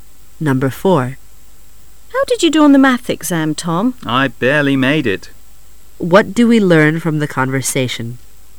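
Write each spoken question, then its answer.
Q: What do we learn from the conversation?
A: Tom barely passed the math exam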